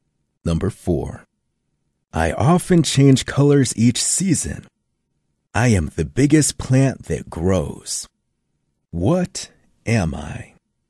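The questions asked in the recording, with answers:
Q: What am I?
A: a tree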